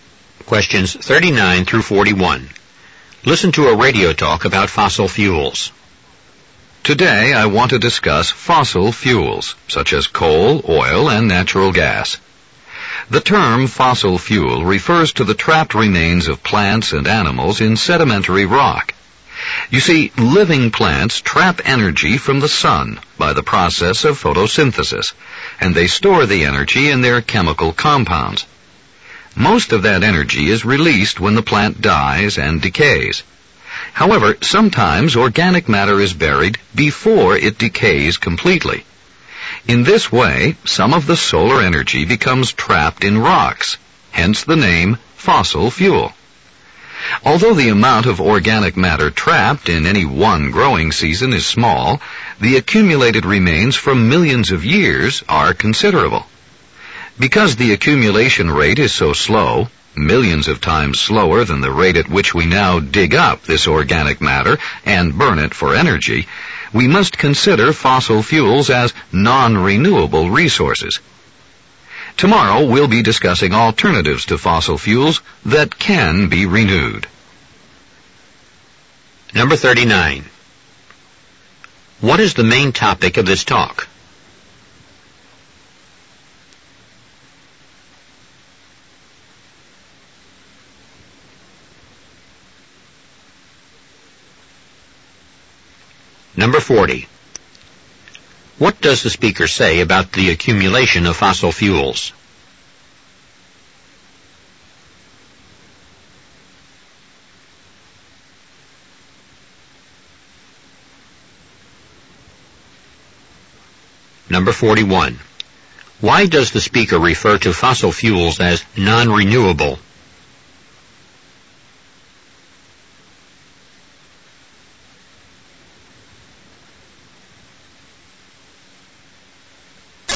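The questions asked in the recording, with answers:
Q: What is the main topic of this talk?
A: Fossil fuels

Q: What does the speaker say about the accumulation of fossil fuels?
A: It is very slow, but over millions of years the remains add up to a lot

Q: Why does the speaker refer to fossil fuels as non-renewable?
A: They build up millions of times more slowly than we use them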